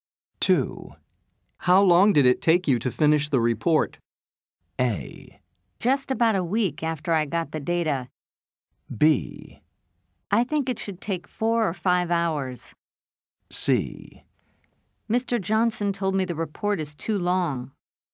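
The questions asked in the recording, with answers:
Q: How long did it take you to finish the report?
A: A: Just about a week after I got the data.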